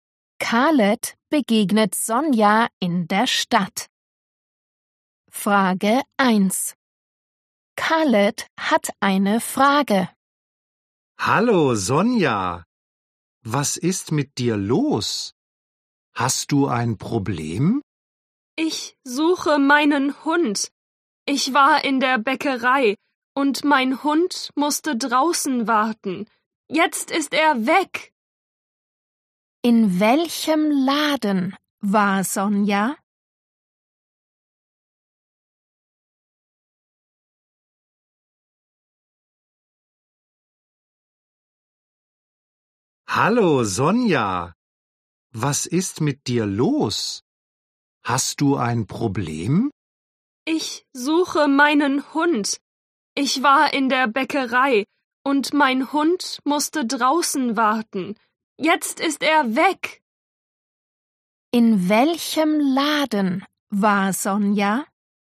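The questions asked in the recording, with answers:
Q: In welchem Laden war Sonja?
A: in der Bäckerei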